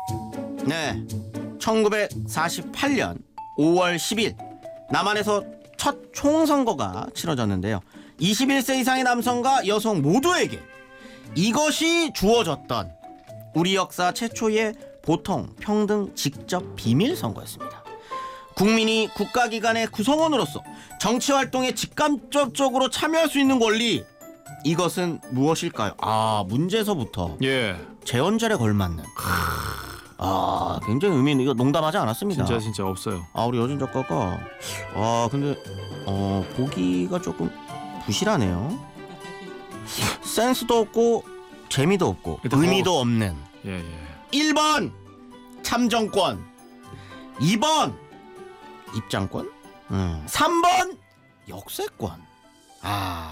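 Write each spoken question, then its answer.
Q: 국민이 국가기관의 구성원으로서 정치활동에 직간접적으로 참여할 수 있는 권리, 이것은 무엇일까요?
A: 1: 참정권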